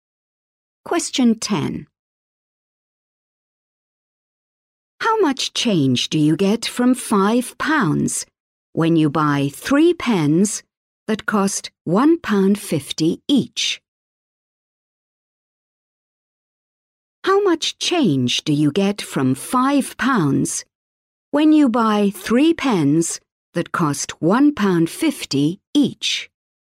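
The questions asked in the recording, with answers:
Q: How much change do you get from £5 when you buy 3 pens that cost £1.50 each?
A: 50p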